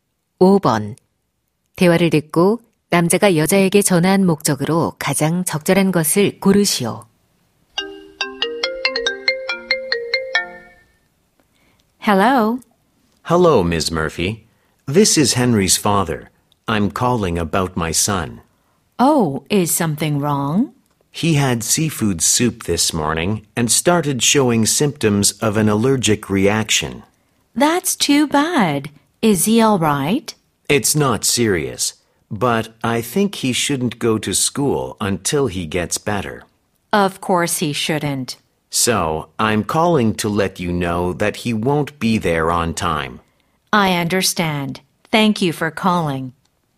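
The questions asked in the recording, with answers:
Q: 남자가 여자에게 전화한 목적으로 가장 적절한 것을 고르시오.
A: 아들이 제시간에 등교하지 못함을 알리려고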